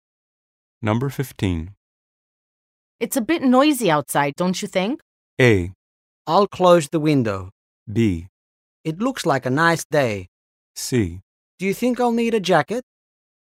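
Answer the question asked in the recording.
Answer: A: I'll close the window.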